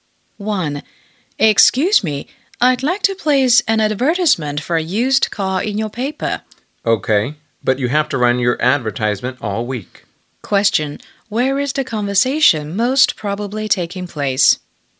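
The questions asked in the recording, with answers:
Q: where is the conversation most probably taking place?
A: At a newspaper office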